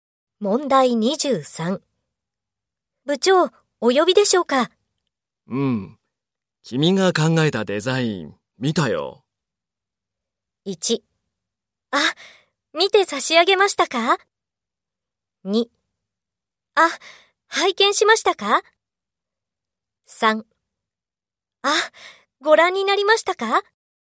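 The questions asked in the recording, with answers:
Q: 部長、お呼びでしょうか?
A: 1: あ、ご覧になりましたか?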